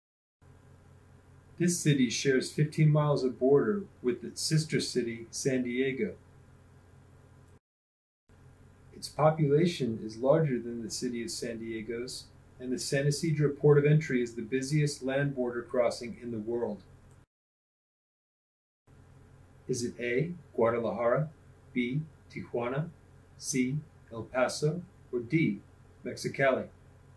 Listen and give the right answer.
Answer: If you chose Tijuana, you're correct.